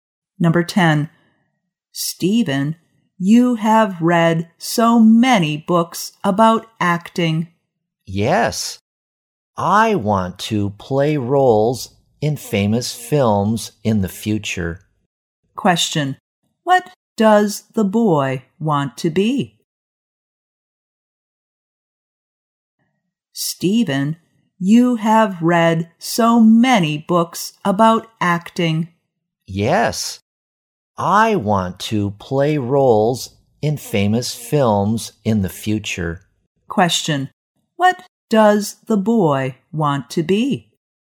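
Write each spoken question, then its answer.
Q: what does the boy want to be?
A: An actor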